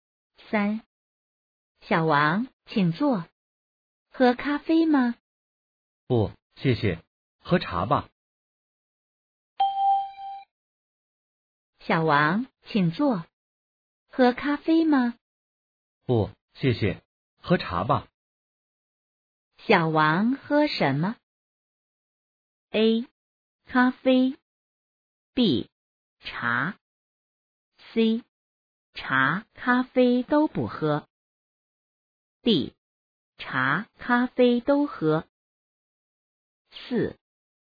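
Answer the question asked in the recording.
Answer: B: 茶。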